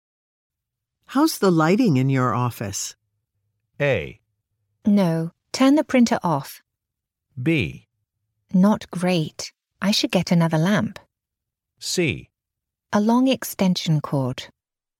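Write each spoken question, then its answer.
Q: How's the lighting in your office?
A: B: Not great. I should get another lamp.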